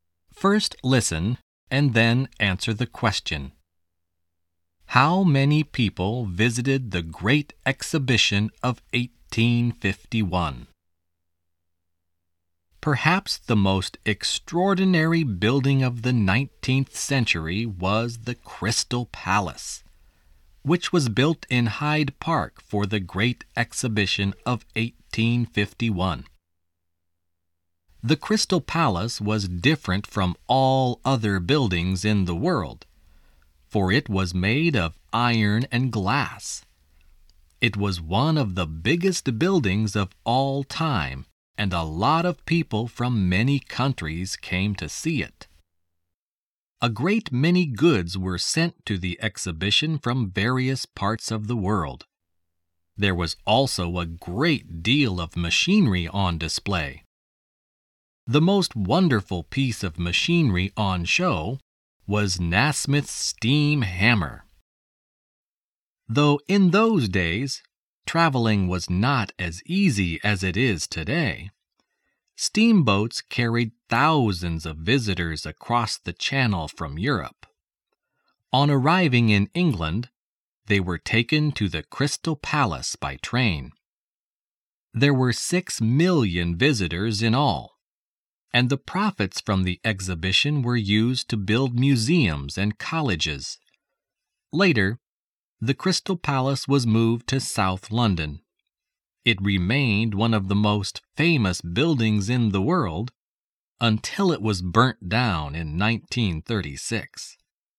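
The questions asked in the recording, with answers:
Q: How many people visited the Great Exhibition of 1851?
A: 6 million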